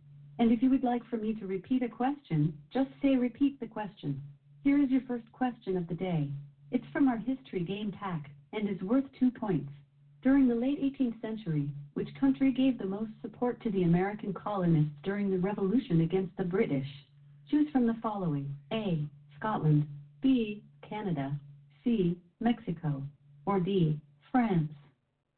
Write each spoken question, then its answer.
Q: During the late 18th century, which country gave the most support to the American colonists during the revolution against the British?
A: The primary ally for the American colonies was France.